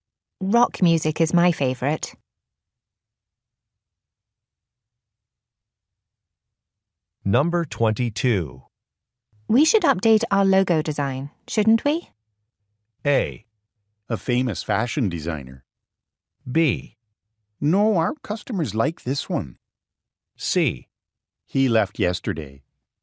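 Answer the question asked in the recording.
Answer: B: No, our customers like this one.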